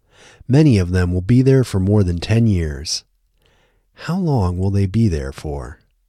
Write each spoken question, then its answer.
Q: How long will they be there for?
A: They will be there for more than 10 years.